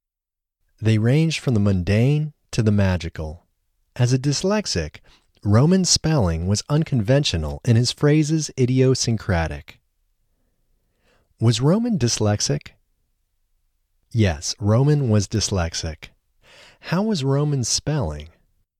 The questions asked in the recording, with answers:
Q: How was Roman's spelling?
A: Roman's spelling was unconventional.